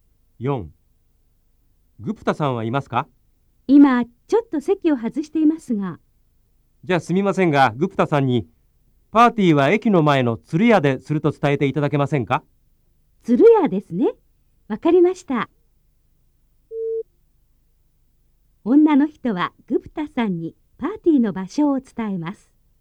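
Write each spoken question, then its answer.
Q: 女の人はグプタさんにパーティーの場所を伝えます。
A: ○(正しい)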